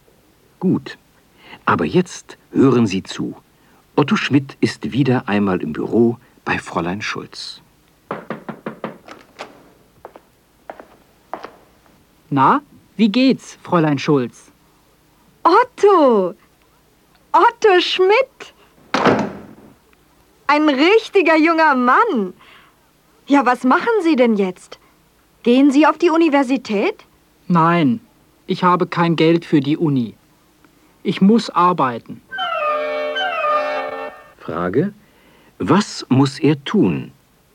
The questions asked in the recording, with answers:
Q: Was muss er tun?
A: Er muss arbeiten.